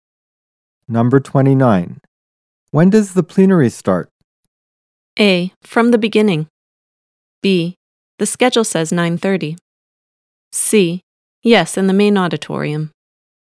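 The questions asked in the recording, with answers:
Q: When does the plenary start?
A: B: The schedule says 9:30.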